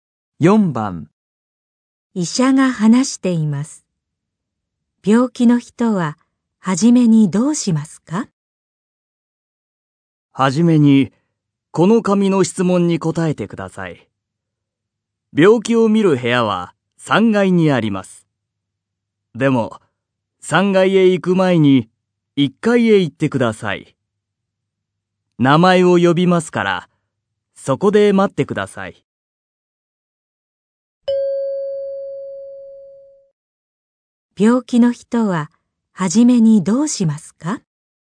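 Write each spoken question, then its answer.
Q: 病気の人は初めにどうしますか?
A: 紙の質問に答える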